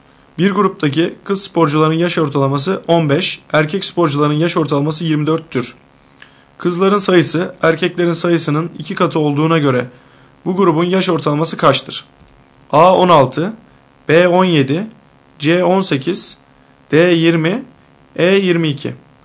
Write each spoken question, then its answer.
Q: Kızların sayısı erkeklerin sayısının 2 katı olduğuna göre bu grubun yaş ortalaması kaçtır?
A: Doğru cevap C 18.